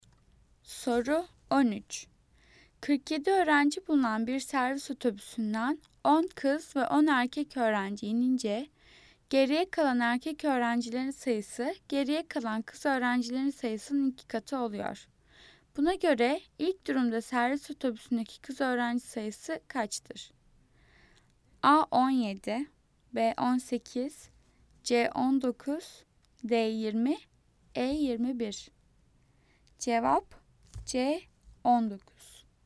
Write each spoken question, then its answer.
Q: Buna göre ilk durumda servis otobüsündeki kız öğrenci sayısı kaçtır?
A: Cevap C 19.